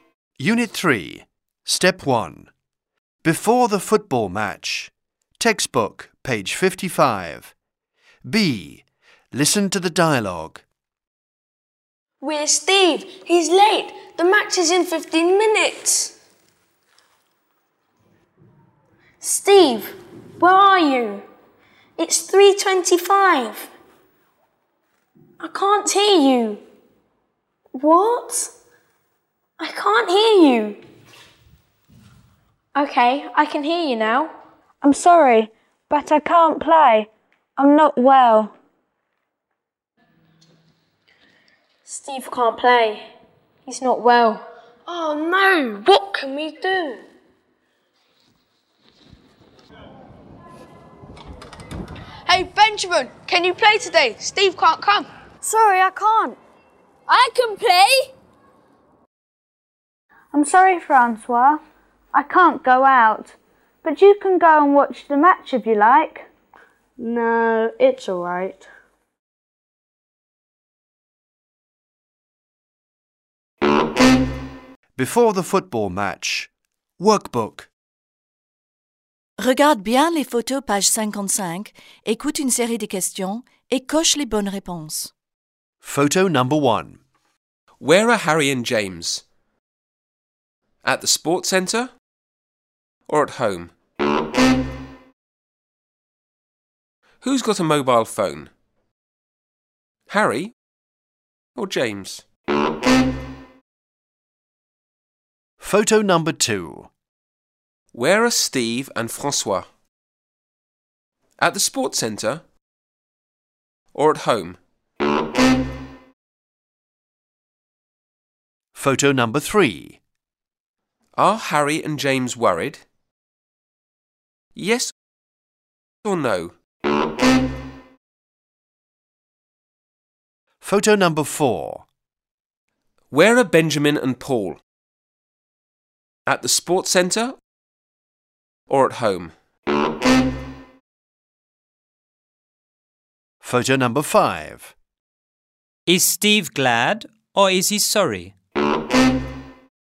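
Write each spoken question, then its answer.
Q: Is Steve glad or is he sorry?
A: He is sorry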